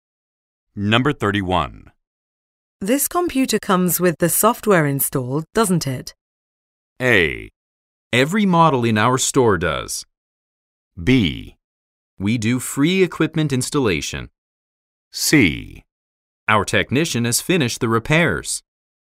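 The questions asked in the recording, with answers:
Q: This computer comes with the software installed, doesn't it?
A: A: Every model in our store does.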